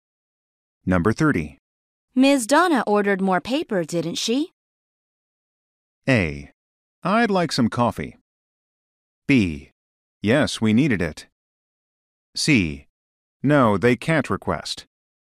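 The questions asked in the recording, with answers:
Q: Ms. Donna ordered more paper, didn't she?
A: B: Yes, we needed it.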